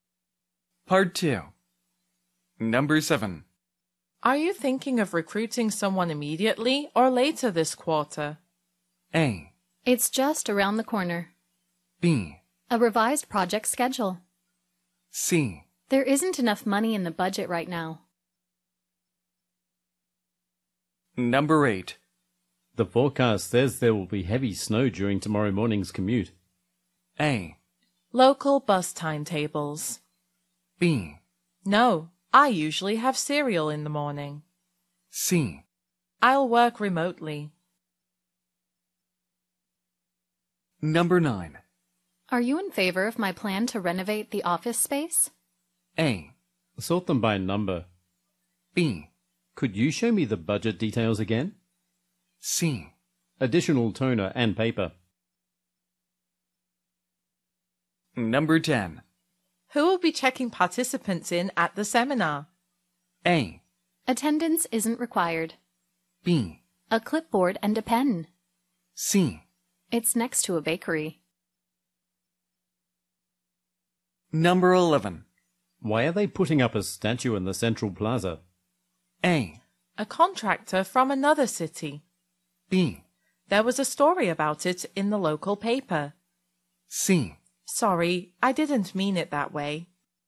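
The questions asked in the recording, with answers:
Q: Are you thinking of recruiting someone immediately or later this quarter?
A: C: There isn't enough money in the budget right now.

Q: The forecast says there will be heavy snow during tomorrow morning's commute.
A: C: I'll work remotely.

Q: Are you in favor of my plan to renovate the office space?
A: B: Could you show me the budget details again?

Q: Why are they putting up a statue in the central plaza?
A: B: There was a story about it in the local paper.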